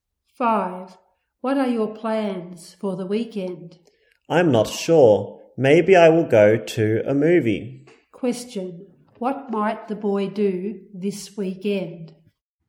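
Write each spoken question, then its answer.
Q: What might the boy do this weekend?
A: Go to a movie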